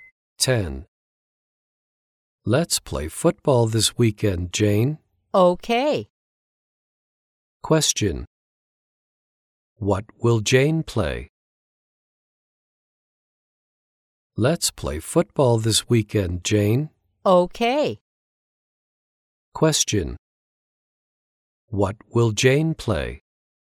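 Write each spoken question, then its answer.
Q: What will Jane play?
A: Football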